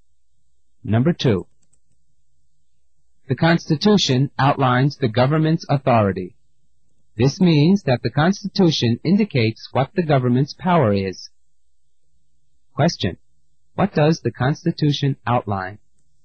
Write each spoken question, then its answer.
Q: What does the Constitution outline?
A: The correct answer is C, the government's power.